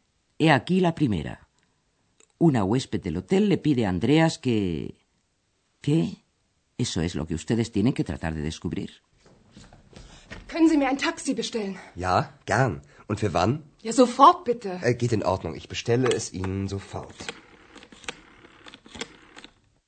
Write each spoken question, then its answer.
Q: Una huésped del hotel le pide a Andreas que... ¿Qué? Eso es lo que ustedes tienen que tratar de descubrir.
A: la señora quiere que Andreas le pida un taxi.